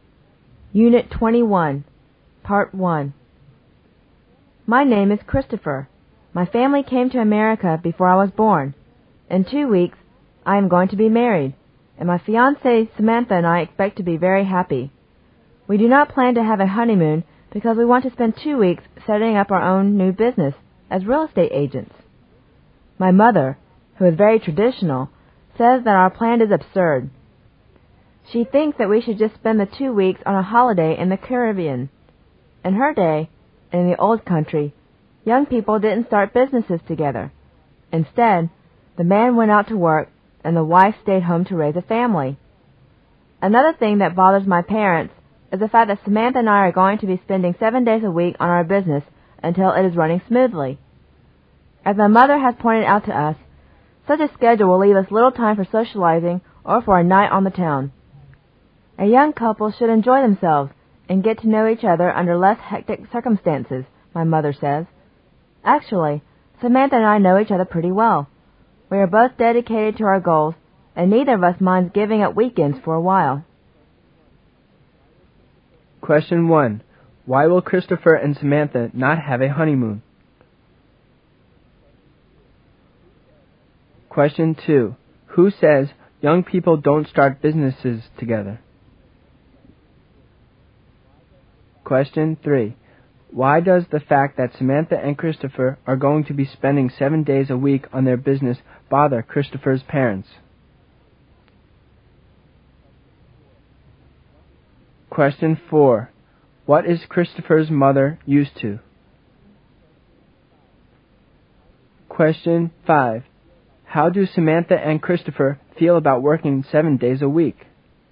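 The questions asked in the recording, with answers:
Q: Why will Christopher and Samantha not have a honeymoon?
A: They want to spend 2 weeks setting up their new real estate business

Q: Who says young people don't start businesses together?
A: Christopher's mother

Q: Why does the fact that Samantha and Christopher are going to be spending 7 days a week on their business bother Christopher's parents?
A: It will leave them little time for socializing or enjoying themselves

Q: What is Christopher's mother used to?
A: The tradition where the man works and the wife stays home to raise a family

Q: How do Samantha and Christopher feel about working 7 days a week?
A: They don't mind giving up weekends for a while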